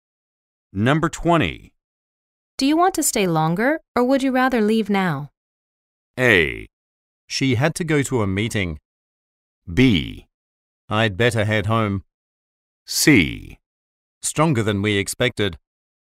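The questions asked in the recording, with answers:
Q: Do you want to stay longer, or would you rather leave now?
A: B: I'd better head home.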